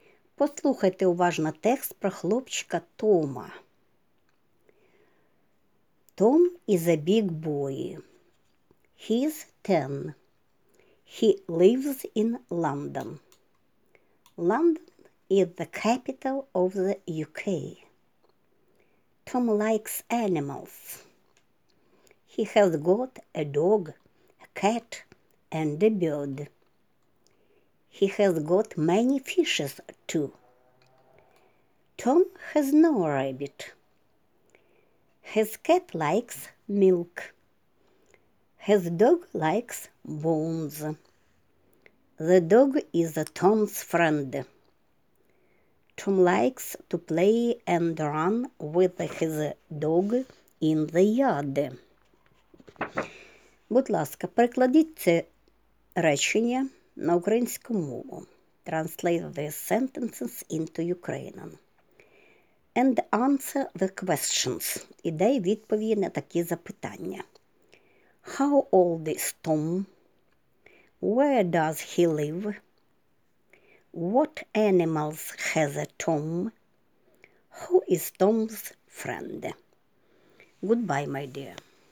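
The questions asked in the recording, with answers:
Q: How old is Tom?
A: He's 10.

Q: Where does he live?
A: In London.

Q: What animals has a Tom?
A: A dog, a cat, a bird and many fishes.

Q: Who is Tom's friend?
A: The dog.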